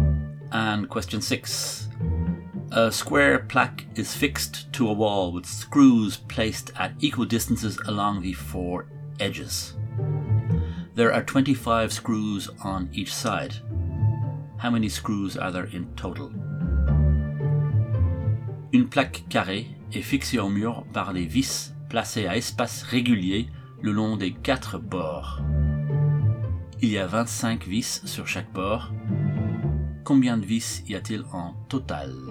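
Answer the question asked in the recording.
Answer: 96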